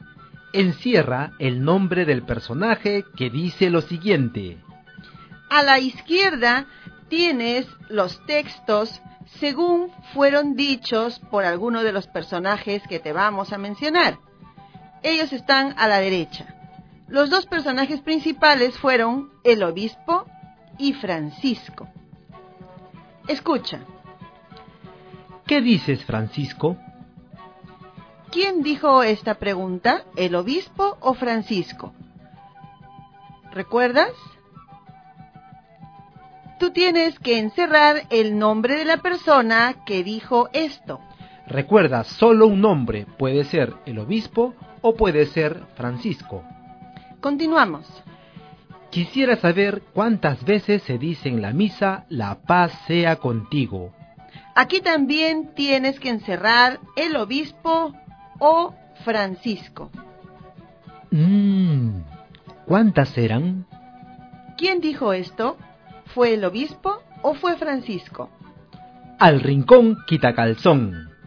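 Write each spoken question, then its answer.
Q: ¿Quién dijo esta pregunta, el obispo o Francisco?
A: El obispo

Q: ¿Quién dijo esto? ¿Fue el obispo o fue Francisco?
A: Francisco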